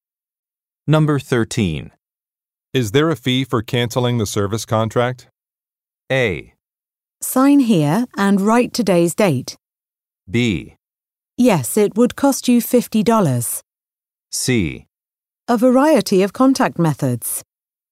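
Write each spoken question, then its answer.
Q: Is there a fee for canceling the service contract?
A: B: Yes, it would cost you $50.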